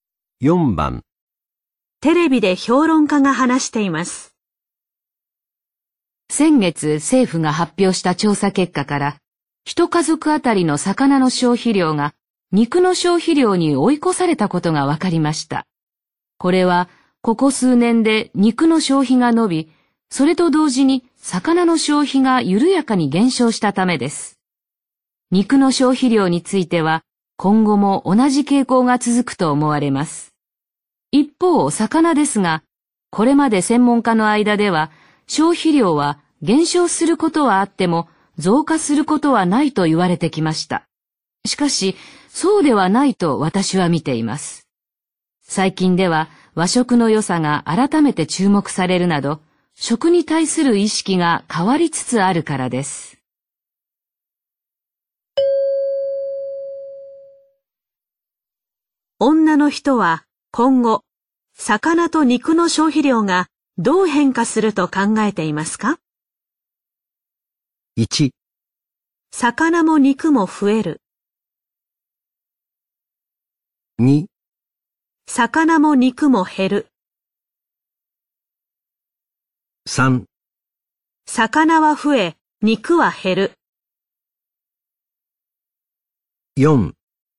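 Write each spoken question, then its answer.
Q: は今後、魚と肉の消費量がどう変化すると考えていますか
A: 1: 魚も肉も増える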